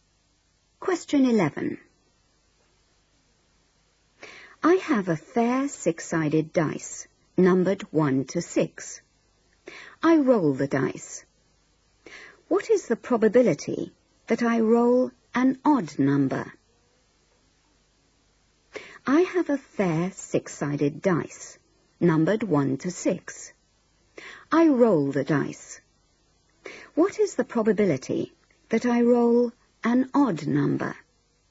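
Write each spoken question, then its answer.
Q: I roll the dice. What is the probability that I roll an odd number?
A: 1/2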